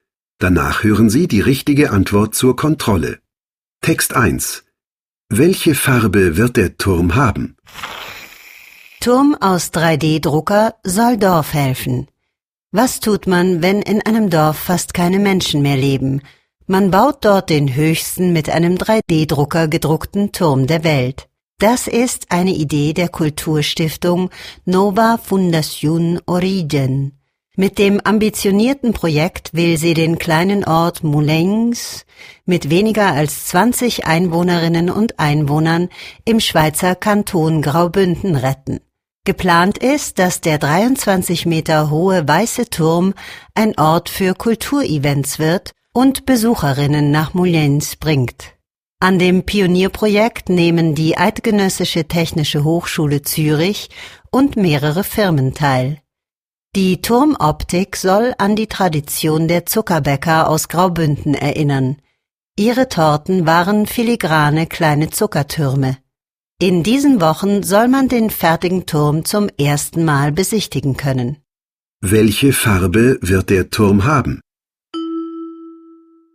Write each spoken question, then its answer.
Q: Welche Farbe wird der Turm haben?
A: Der 23 Meter hohe Turm wird weiß sein.